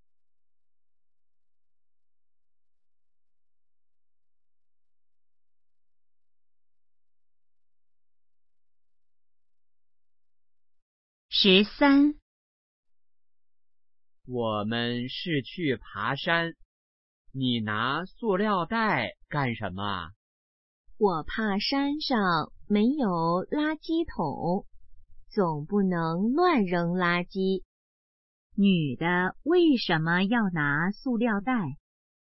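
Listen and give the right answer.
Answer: 怕山上没有垃圾桶,不能乱扔垃圾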